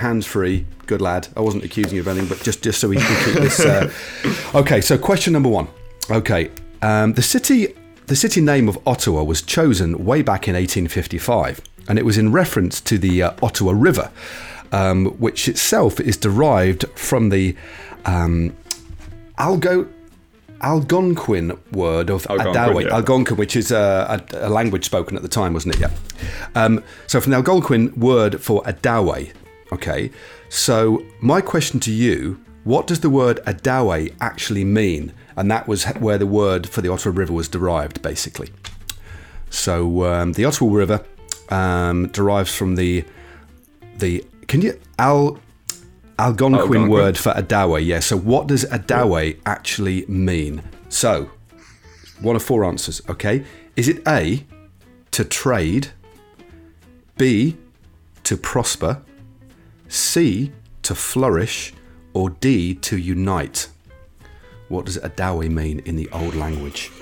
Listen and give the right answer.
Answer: so it is actually to trade